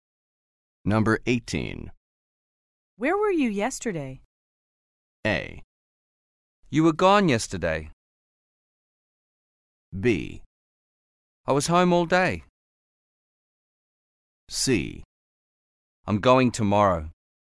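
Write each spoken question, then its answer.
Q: Where were you yesterday?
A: B: I was home all day.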